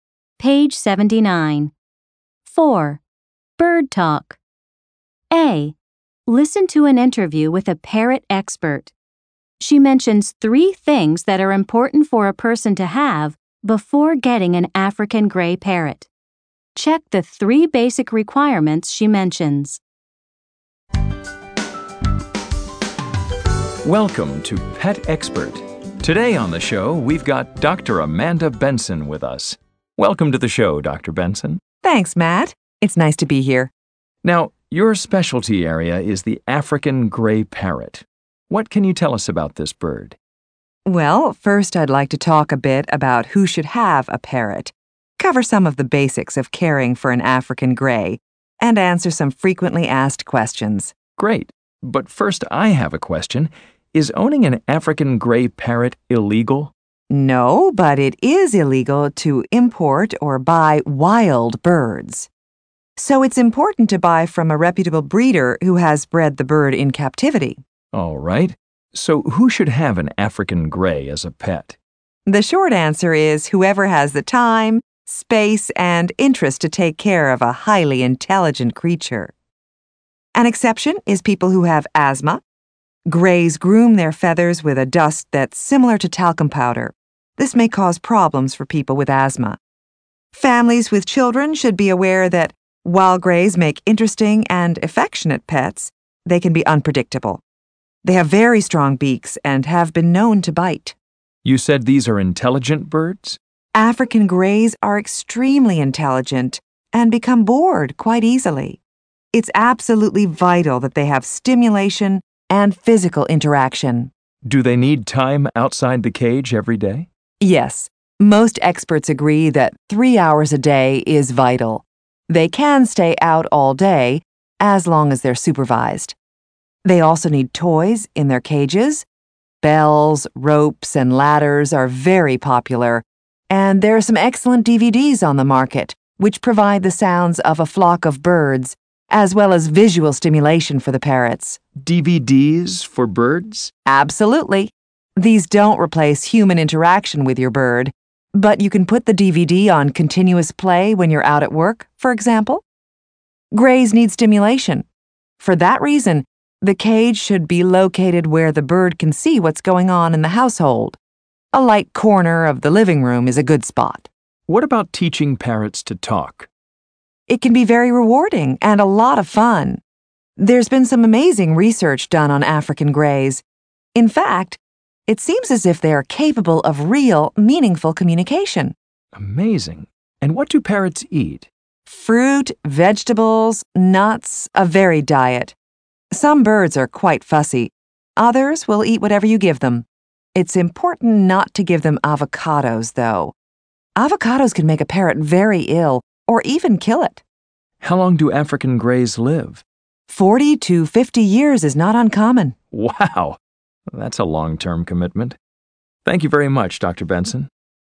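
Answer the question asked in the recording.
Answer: time, space, and interest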